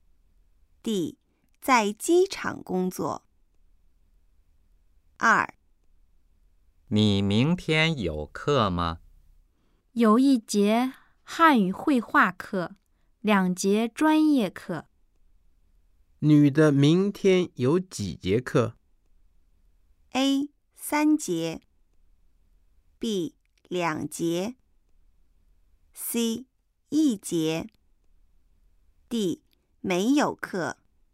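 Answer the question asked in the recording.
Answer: A: 三节。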